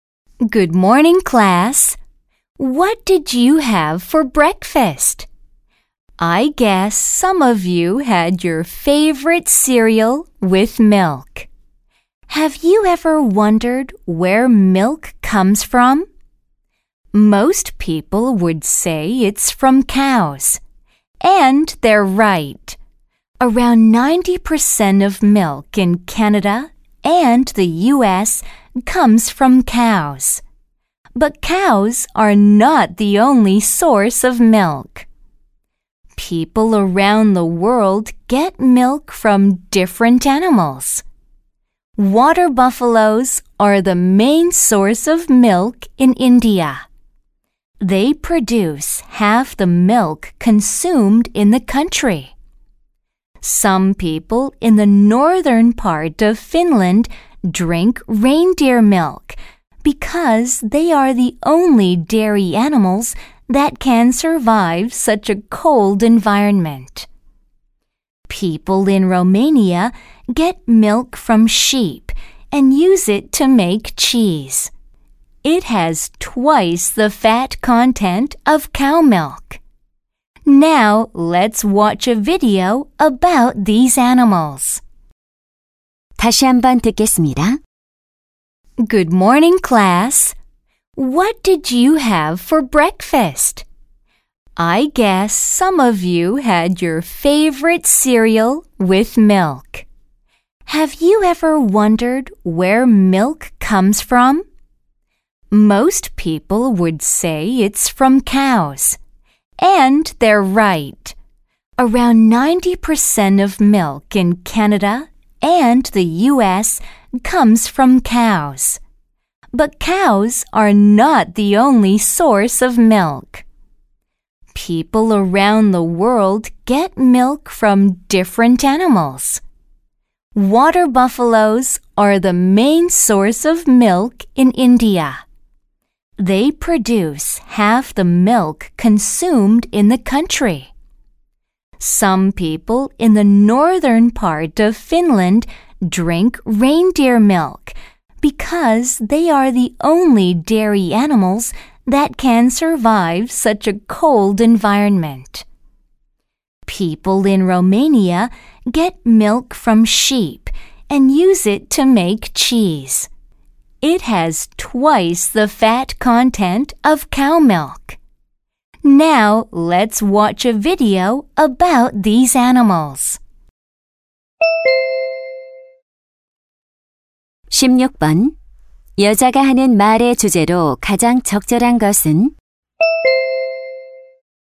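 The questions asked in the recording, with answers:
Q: 여자가 하는 말의 주제로 가장 적절한 것은?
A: 세계 여러 지역에서 우유를 얻는 다양한 동물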